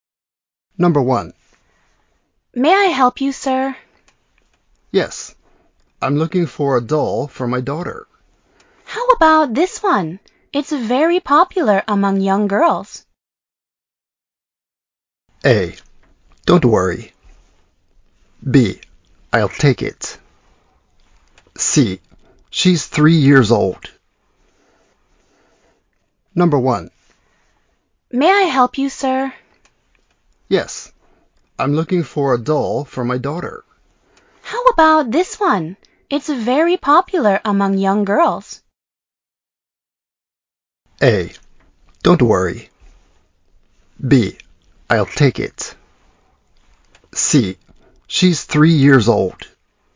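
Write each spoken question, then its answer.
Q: How about this one? It's very popular among young girls.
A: B: I'll take it.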